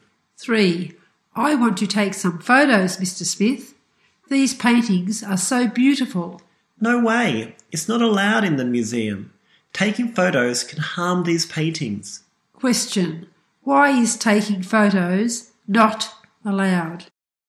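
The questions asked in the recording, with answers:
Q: Why is taking photos not allowed?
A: Taking photos can harm the paintings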